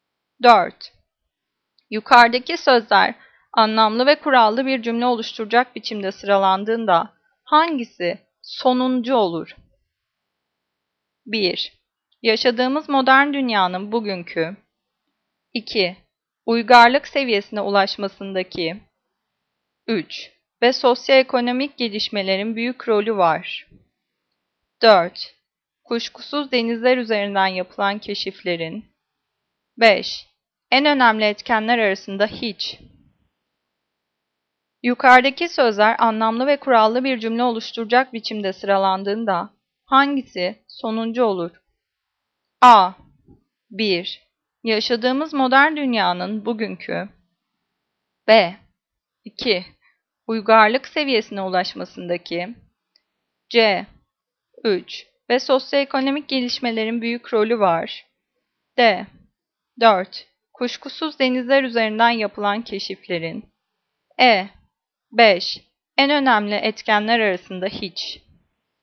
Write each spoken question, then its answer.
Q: Yukarıdaki sözler anlamlı ve kurallı bir cümle oluşturacak biçimde sıralandığında hangisi sonuncu olur?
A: Cevap C. 3. Ve sosyoekonomik gelişmelerin büyük rolü var.